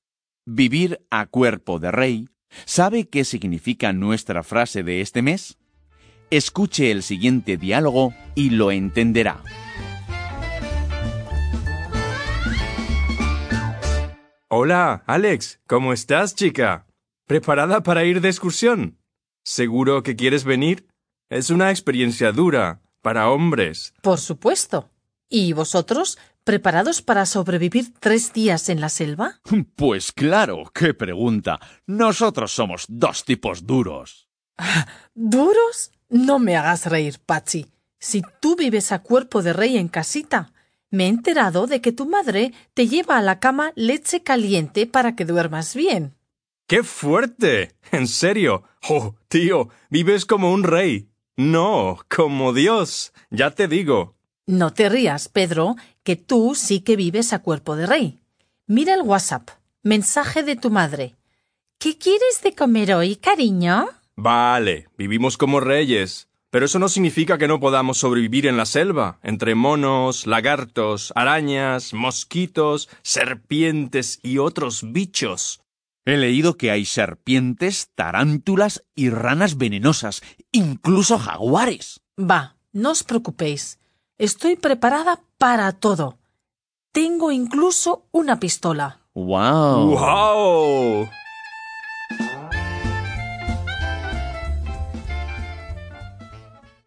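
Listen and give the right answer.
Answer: Vivir como un rey, con muchas comodidades y lujos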